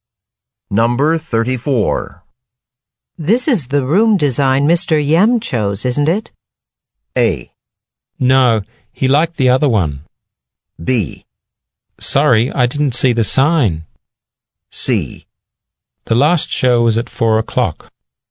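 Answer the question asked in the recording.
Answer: A: No, he liked the other one.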